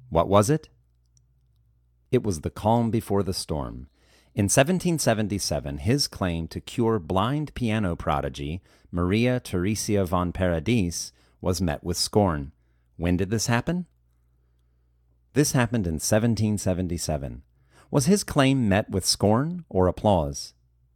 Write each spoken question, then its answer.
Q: Was his claim met with scorn or applause?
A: His claim was met with scorn.